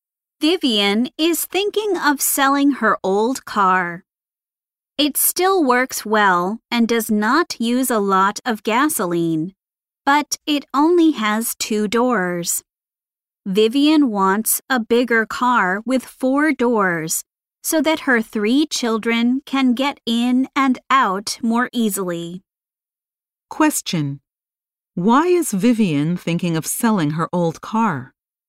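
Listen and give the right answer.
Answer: She wants a bigger car with 4 doors for her children.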